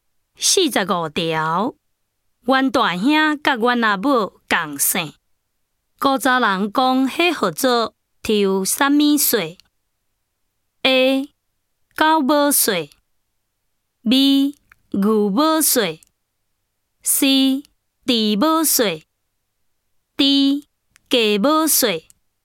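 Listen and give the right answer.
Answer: C: 猪母税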